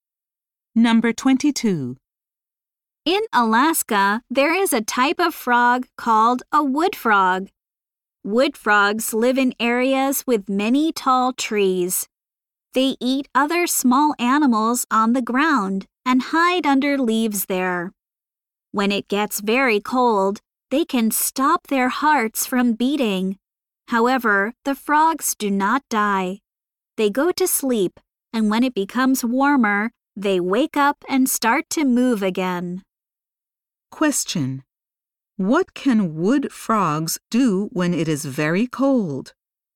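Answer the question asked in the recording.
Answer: They can stop their hearts from beating.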